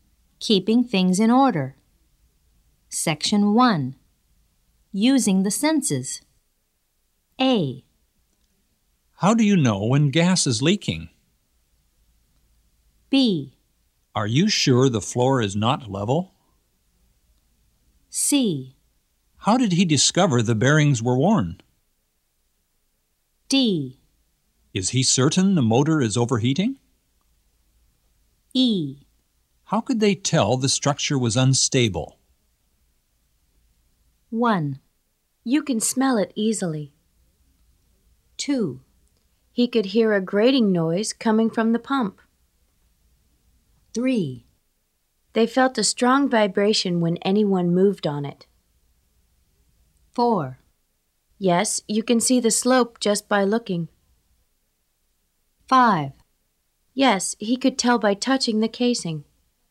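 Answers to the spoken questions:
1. 1: You can smell it easily.
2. 4: Yes, you can see the slope just by looking.
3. 2: He could hear a grating noise coming from the pump.
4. 5: Yes, he could tell by touching the casing.
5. 3: They felt a strong vibration when anyone moved on it.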